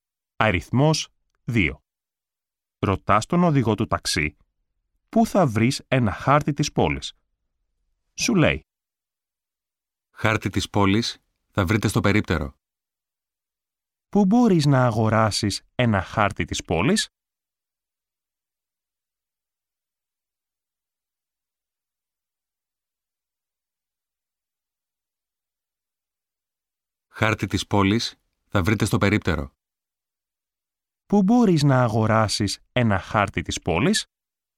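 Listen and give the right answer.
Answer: Στο περίπτερο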